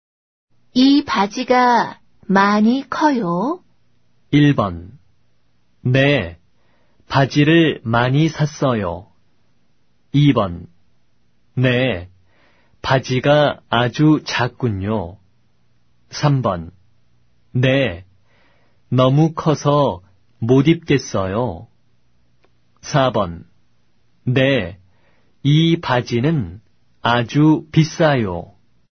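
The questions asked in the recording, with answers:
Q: 이 바지가 많이 커요?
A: 3: 네, 너무 커서 못 입겠어요.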